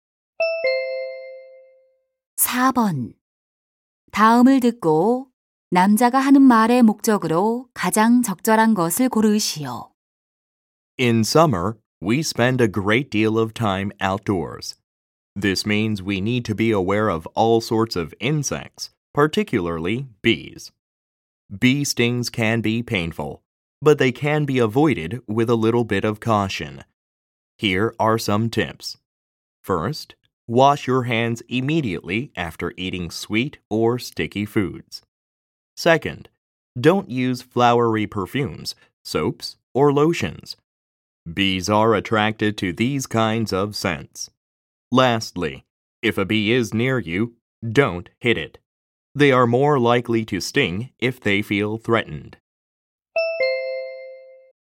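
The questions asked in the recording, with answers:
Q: 다음을 듣고 남자가 하는 말의 목적으로 가장 적절한 것을 고르시오.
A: 벌에 쏘이지 않는 방법을 알려 주려고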